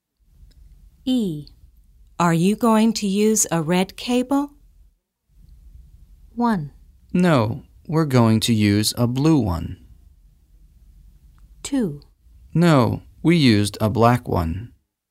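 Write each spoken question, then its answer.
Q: Are you going to use a red cable?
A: 1: No, we're going to use a blue one.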